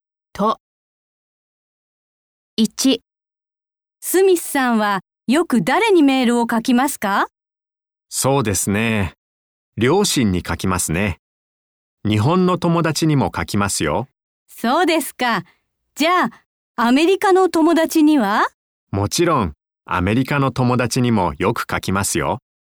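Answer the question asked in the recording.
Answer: 両親、日本の友達、アメリカの友達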